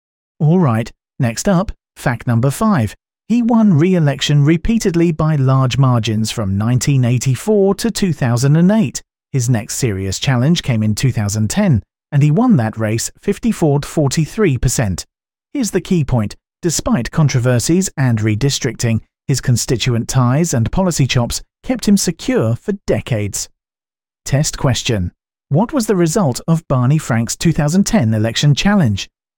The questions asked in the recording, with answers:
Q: What was the result of Barney Frank's 2010 election challenge?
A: A 54-43% win.